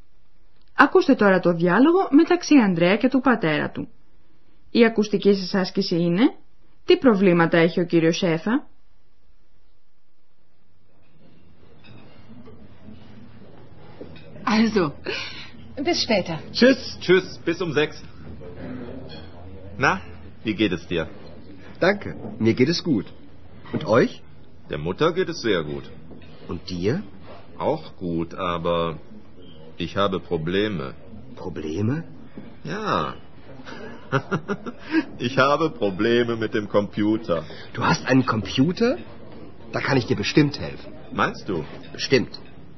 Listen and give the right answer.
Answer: Ο κύριος Σέφα έχει δυσκολίες με τον ηλεκτρονικό υπολογιστή.